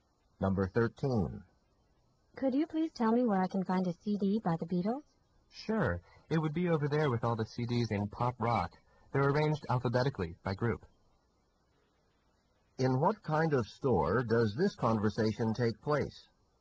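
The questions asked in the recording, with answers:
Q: In what kind of store does this conversation take place?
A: A music store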